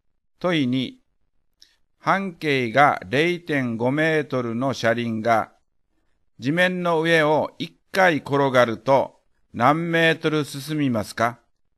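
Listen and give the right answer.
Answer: 3.14メートル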